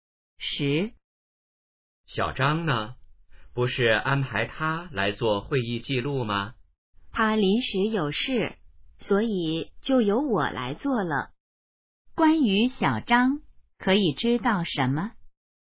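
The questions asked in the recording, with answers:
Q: 关于小张,可以知道什么?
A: 他临时有事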